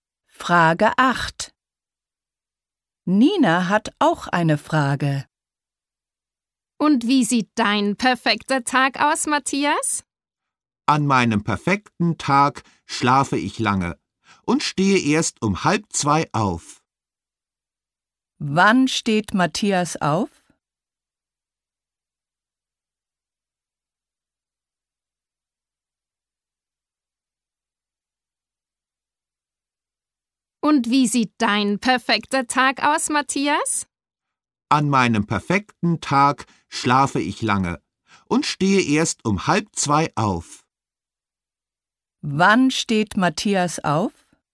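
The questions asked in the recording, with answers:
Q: Wann steht Matthias auf?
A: Um 1:30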